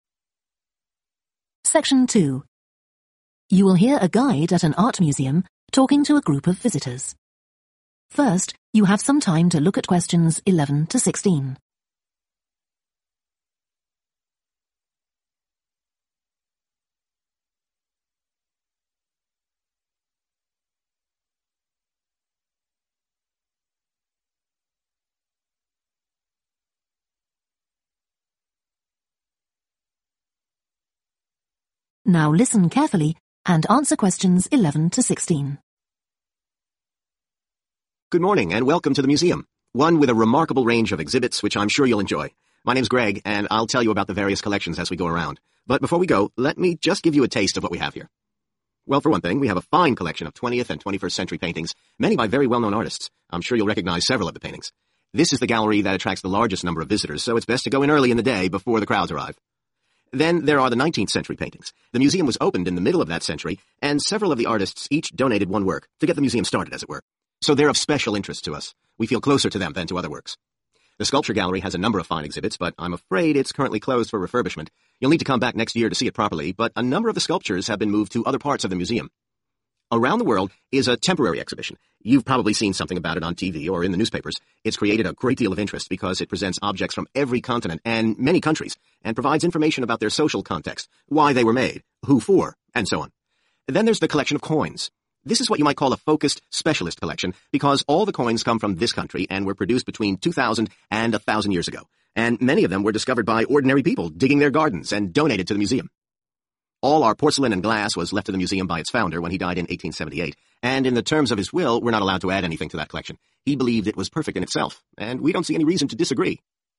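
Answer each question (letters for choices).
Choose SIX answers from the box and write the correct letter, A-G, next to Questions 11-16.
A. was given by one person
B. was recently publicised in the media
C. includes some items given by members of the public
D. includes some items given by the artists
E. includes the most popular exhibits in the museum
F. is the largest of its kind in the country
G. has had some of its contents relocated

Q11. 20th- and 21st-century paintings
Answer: E

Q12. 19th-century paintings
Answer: D

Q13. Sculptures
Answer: G

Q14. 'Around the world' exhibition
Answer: B

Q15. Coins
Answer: C

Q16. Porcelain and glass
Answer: A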